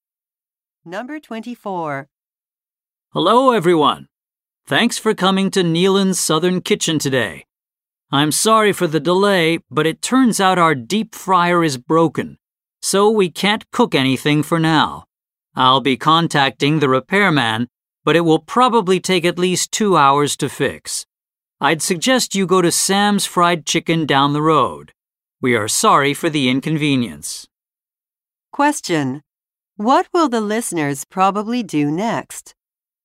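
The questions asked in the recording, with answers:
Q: What will the listeners probably do next?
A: Go to Sam's Fried Chicken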